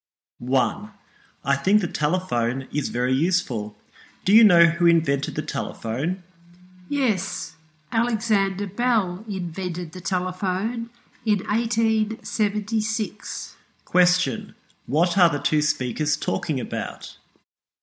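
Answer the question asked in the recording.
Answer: The telephone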